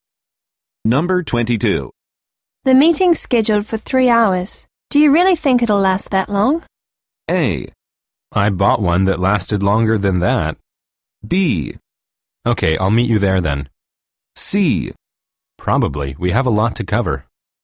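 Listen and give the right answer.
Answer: C: Probably. We have a lot to cover.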